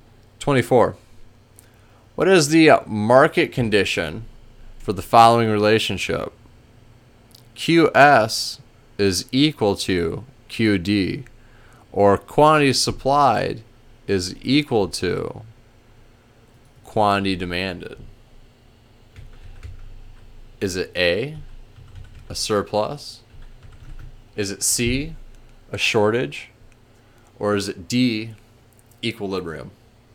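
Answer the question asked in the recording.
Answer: D: equilibrium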